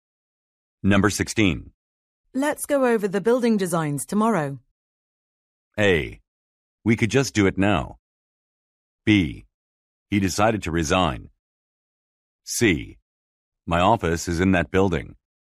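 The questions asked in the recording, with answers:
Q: Let's go over the building designs tomorrow.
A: A: We could just do it now.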